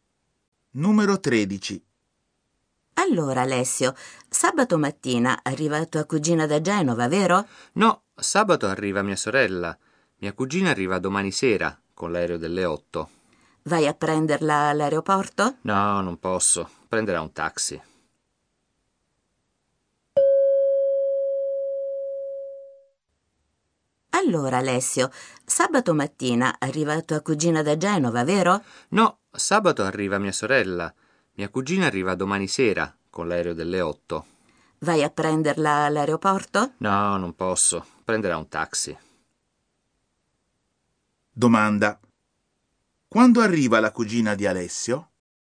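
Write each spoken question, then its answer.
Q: Quando arriva la cugina di Alessio?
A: Domani sera, con l'aereo delle 8.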